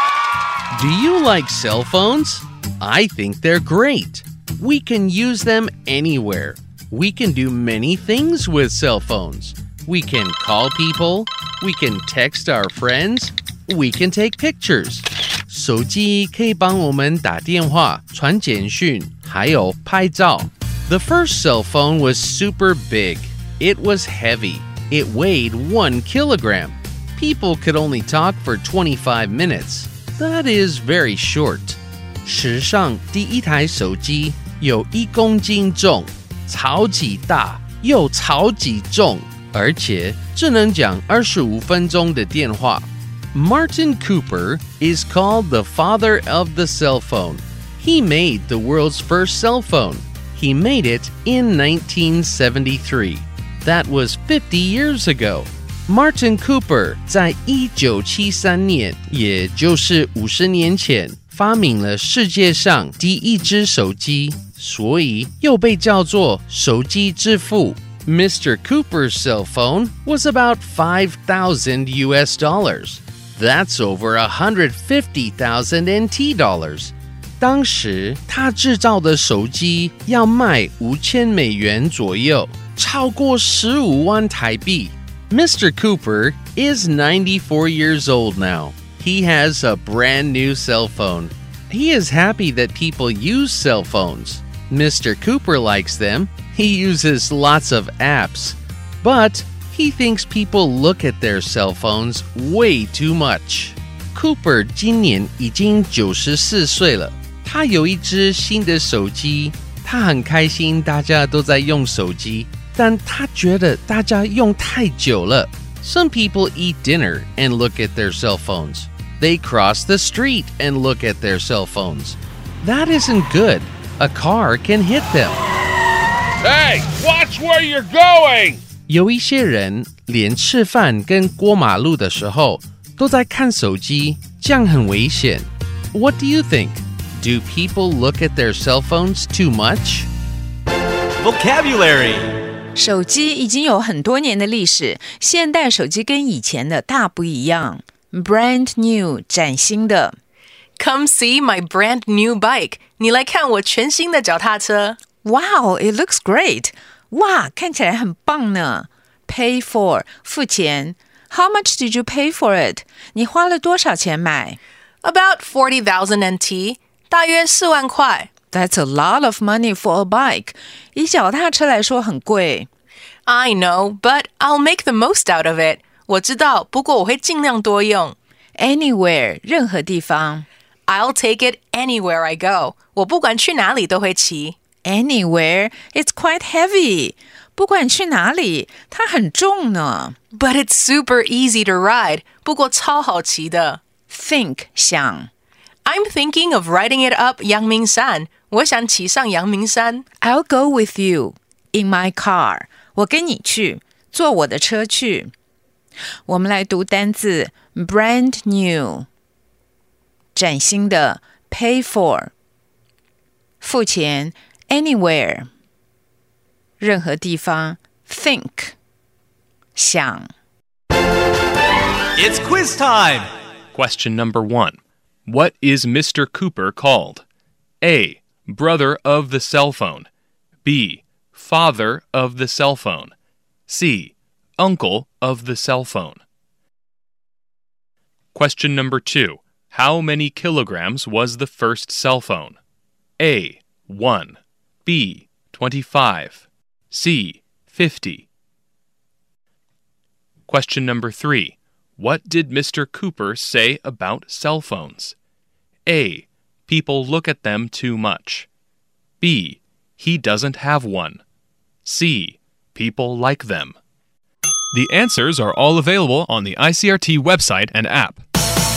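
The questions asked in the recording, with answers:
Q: What is Mr. Cooper called? A. Brother of the cell phone.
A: B: Father of the cell phone.

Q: How many kilograms was the first cell phone?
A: A: 1

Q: What did Mr. Cooper say about cell phones?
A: A: People look at them too much.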